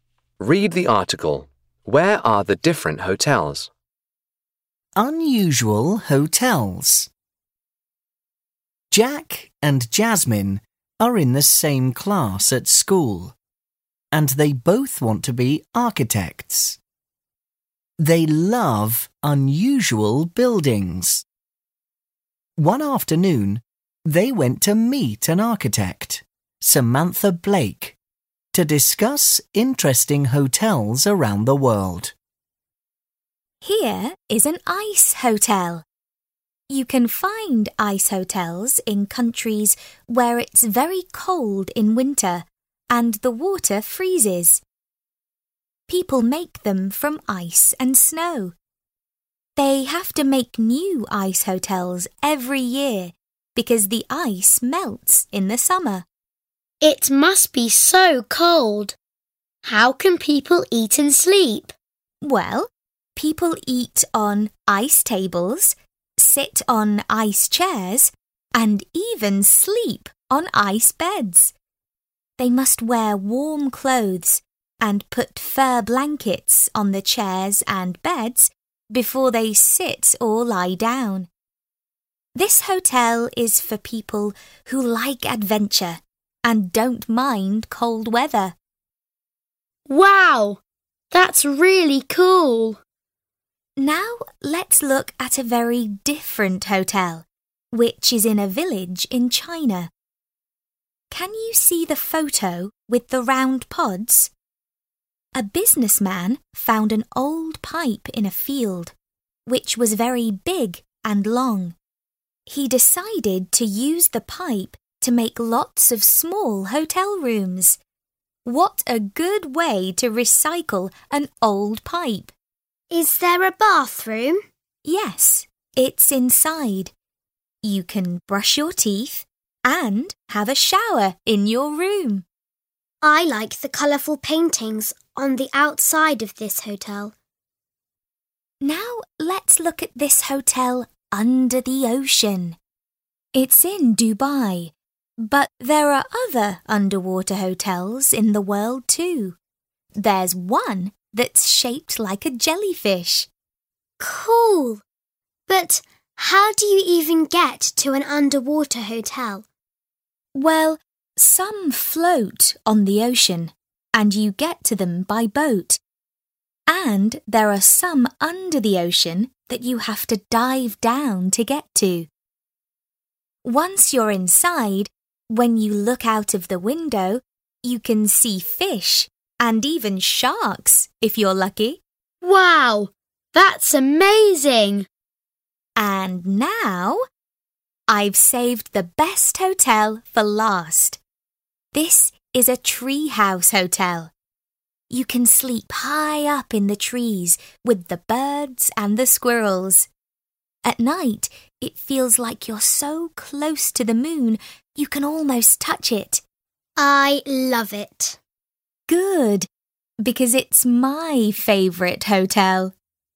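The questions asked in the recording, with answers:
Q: Where are the different hotels?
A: The ice hotels are in very cold countries, the pipe hotel is in a village in China, the underwater hotel is in Dubai (under the ocean), and the treehouse hotel is high up in the trees.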